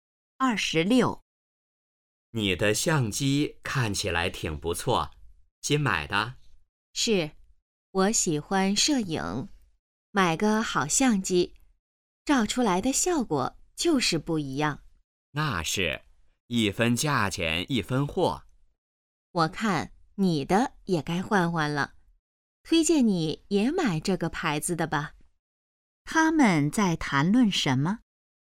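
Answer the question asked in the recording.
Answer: 相机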